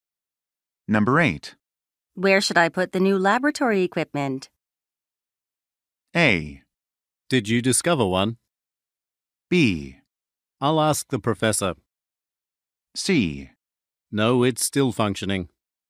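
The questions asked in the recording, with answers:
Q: Where should I put the new laboratory equipment?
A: B: I'll ask the professor.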